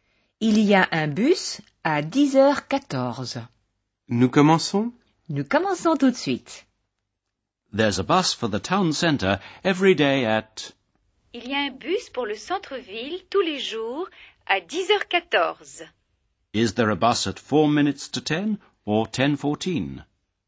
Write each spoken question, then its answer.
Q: Is there a bus at 4 minutes to 10 or 10:14?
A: There's a bus at 10:14, 14 minutes past 10.